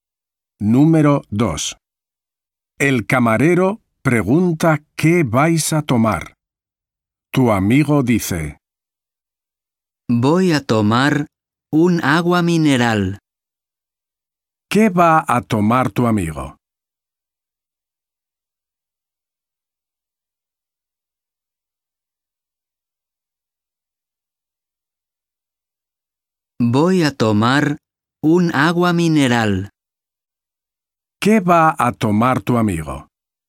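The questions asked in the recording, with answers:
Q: ¿Qué va a tomar tu amigo?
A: un agua mineral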